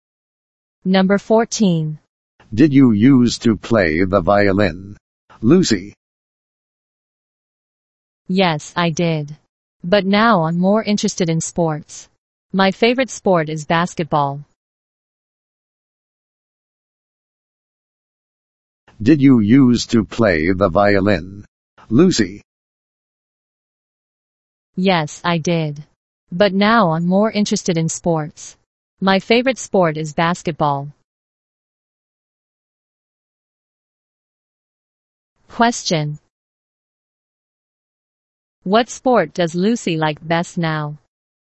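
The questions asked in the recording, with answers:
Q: What sport does Lucy like best now?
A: Basketball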